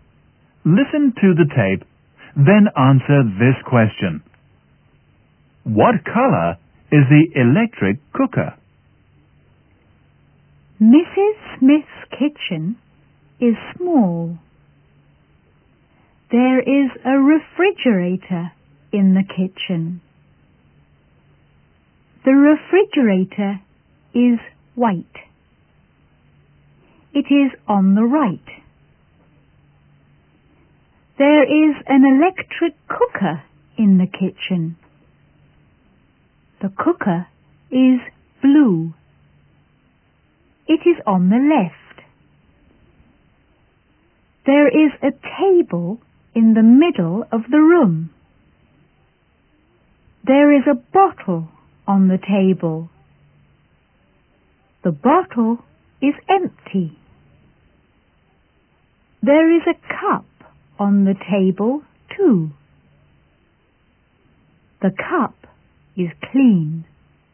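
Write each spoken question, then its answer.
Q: What color is the electric cooker?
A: Blue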